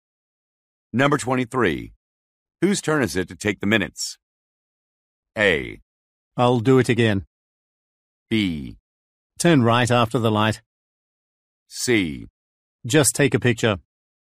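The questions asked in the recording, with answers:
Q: Whose turn is it to take the minutes?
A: A: I'll do it again.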